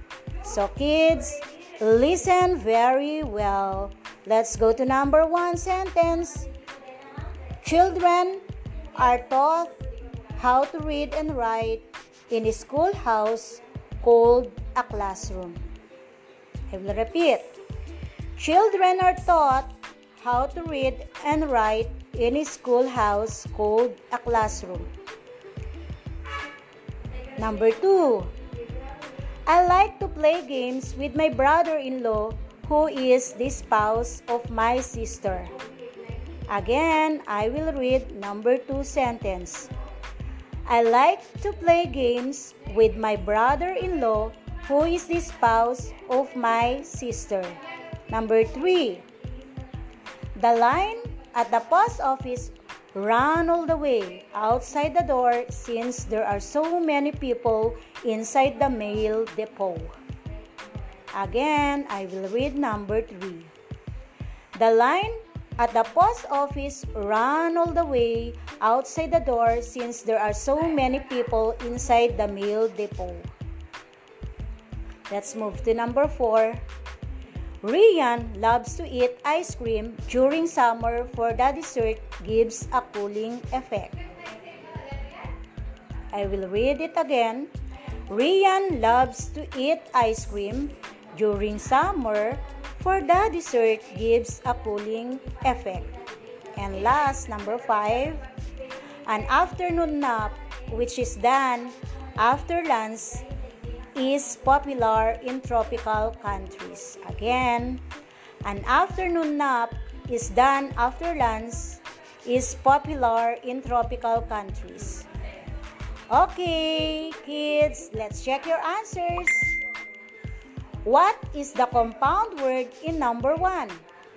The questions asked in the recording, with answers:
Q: What is the compound word in number one?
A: Correct, it's a schoolhouse.